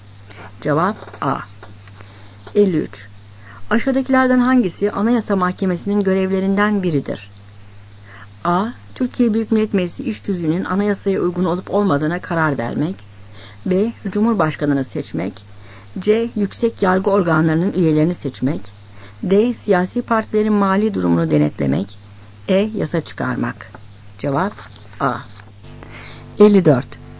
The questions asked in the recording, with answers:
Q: Aşağıdakilerden hangisi Anayasa Mahkemesi'nin görevlerinden biridir?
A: Cevap A.